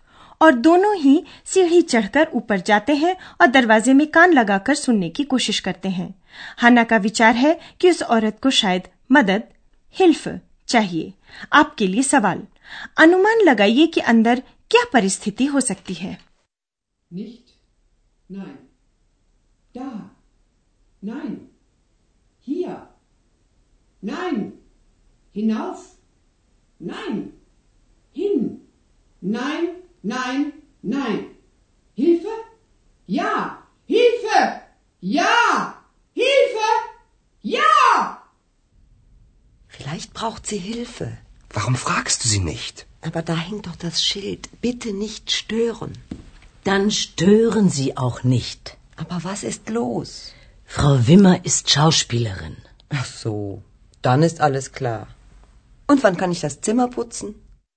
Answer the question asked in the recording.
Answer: हाँ श्रीमती विमर अभिनेत्री हैं और अपनी भूमिका का अभ्यास कर रही हैं